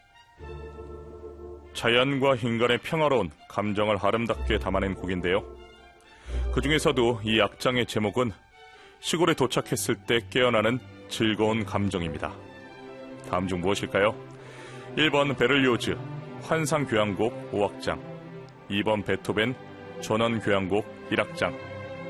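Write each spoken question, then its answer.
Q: 다음 중 무엇일까요? 1번 베를리오즈 환상교향곡 5악장, 2번 베토벤 전원교향곡 1악장.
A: 2번: 베토벤 전원교향곡 1악장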